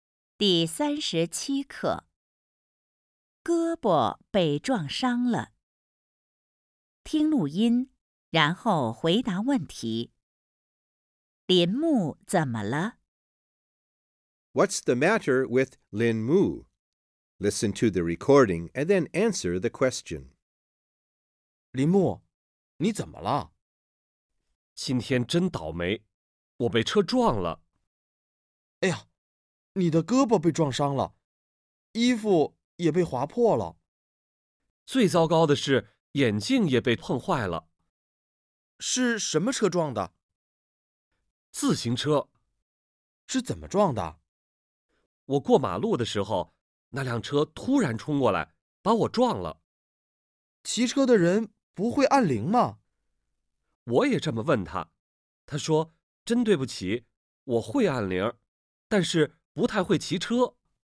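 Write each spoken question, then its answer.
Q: 林木怎么了?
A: 他被自行车撞了,胳膊被撞伤了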